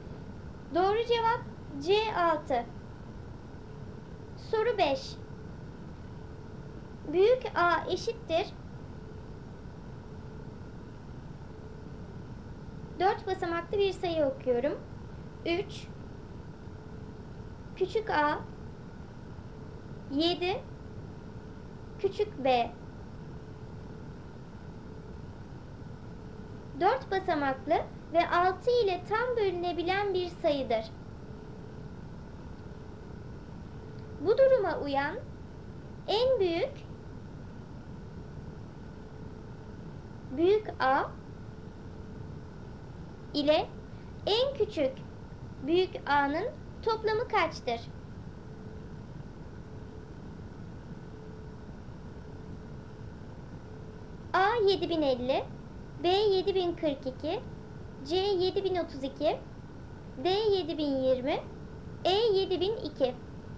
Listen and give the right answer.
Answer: Doğru cevap A 7050.